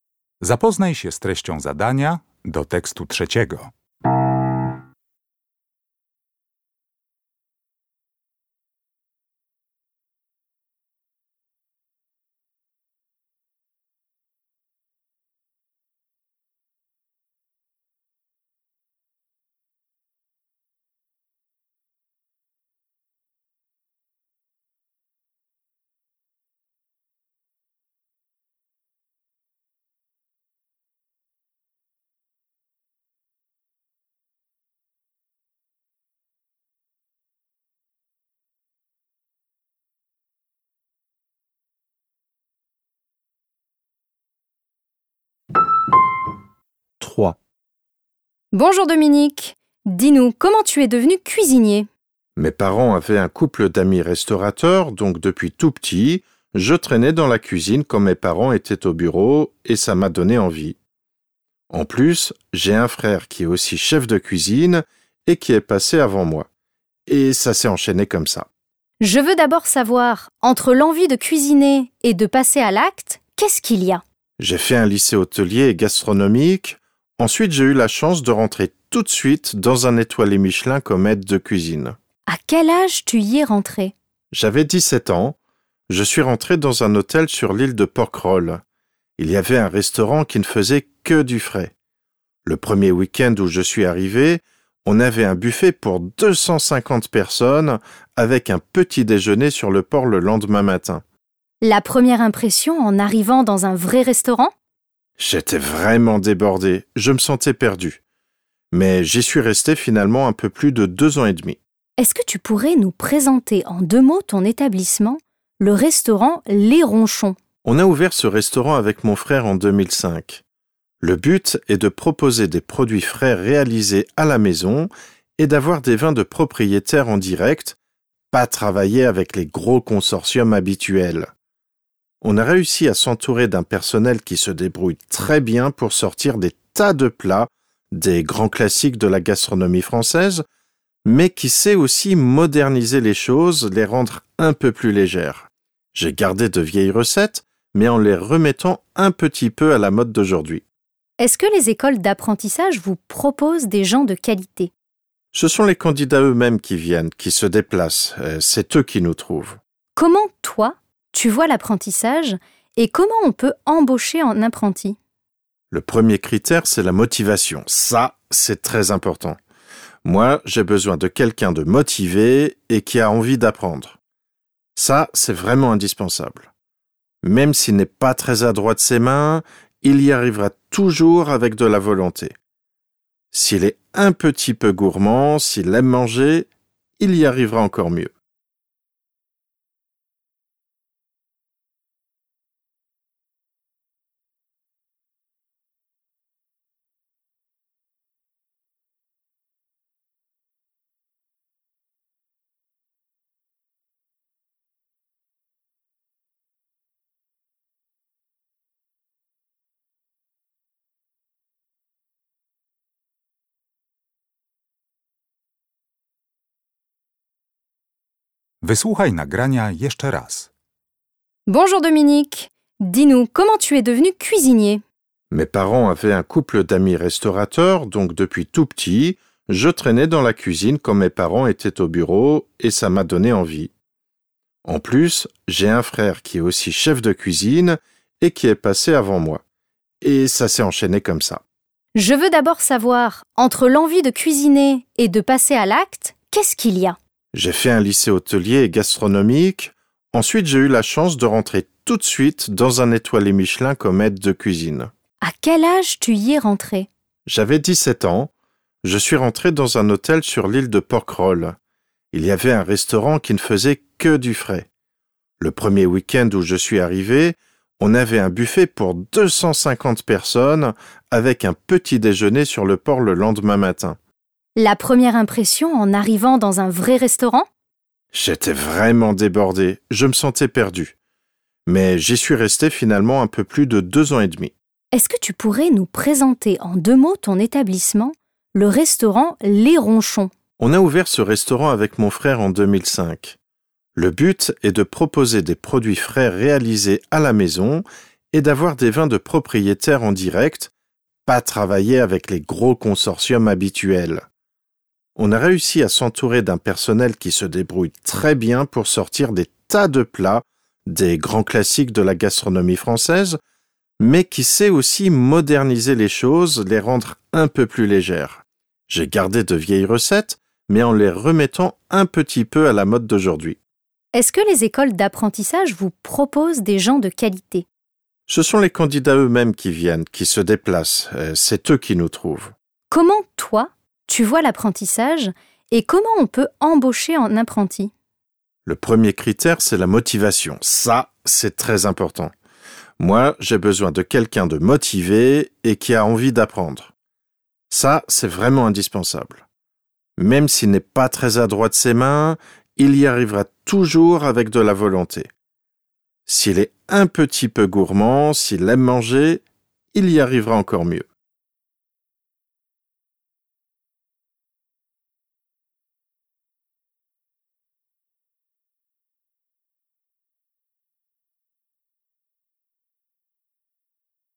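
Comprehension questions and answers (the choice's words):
Uruchamiając odtwarzacz z oryginalnym nagraniem CKE usłyszysz dwukrotnie trzy teksty. Z podanych odpowiedzi wybierz właściwą, zgodną z treścią nagrania.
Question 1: Laquelle des phrases ci-dessous est fausse ?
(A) Dominique partage la passion de son frère.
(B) Enfant, Dominique passait du temps dans un restaurant.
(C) Dominique a suivi ses parents dans le choix de sa profession.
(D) Dominique a une formation professionnelle dans son domaine.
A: Dominique a suivi ses parents dans le choix de sa profession.

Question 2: Dans son premier lieu de travail, Dominique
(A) était très sûr de lui.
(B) se sentait dépassé par le travail.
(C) collaborait avec 250 personnes.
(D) ne servait que les petits-déjeuners.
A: se sentait dépassé par le travail.

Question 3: En parlant de son propre restaurant, Dominique dit que/qu'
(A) il suit à la lettre de vieilles recettes.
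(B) il collabore avec de gros consortiums.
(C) ses employés répondent à ses attentes.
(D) les écoles gastronomiques lui proposent des apprentis.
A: ses employés répondent à ses attentes.

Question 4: L'intention de Dominique est de/d'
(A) expliquer son parcours professionnel.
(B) décrire les goûts culinaires des Français.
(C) se plaindre des obstacles dans son travail.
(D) évaluer l'enseignement de la gastronomie en France.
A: expliquer son parcours professionnel.

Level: Poziom: rozszerzony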